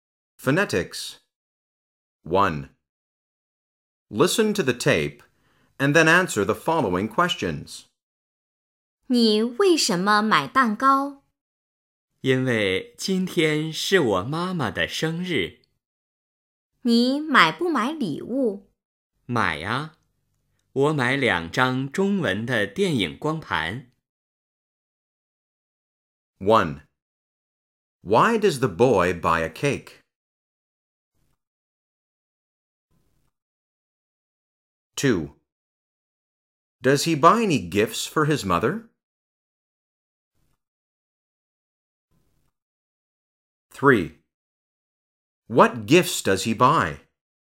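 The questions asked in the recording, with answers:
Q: Why does the boy buy a cake?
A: Because today is his mother's birthday.

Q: Does he buy any gifts for his mother?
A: Yes.

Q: What gifts does he buy?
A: Two Chinese movie discs.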